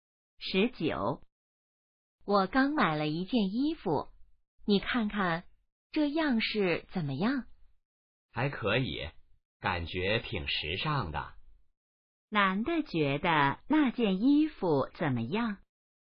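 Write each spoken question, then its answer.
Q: 男的觉得那件衣服怎么样?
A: 挺时尚的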